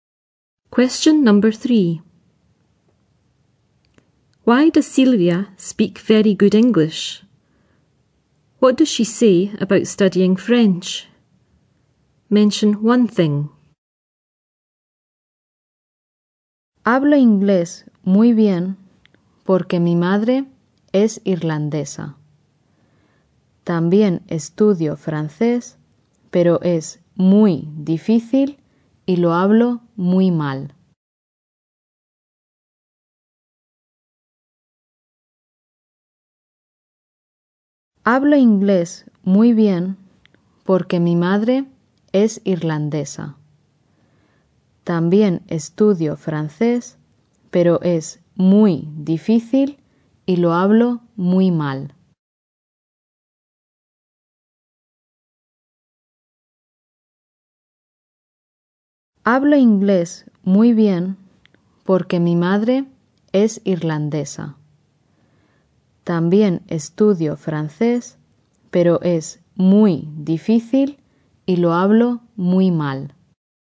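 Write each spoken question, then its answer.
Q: Why does Silvia speak very good English?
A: Her mother is Irish

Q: What does she say about studying French?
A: It is very difficult and she speaks it very badly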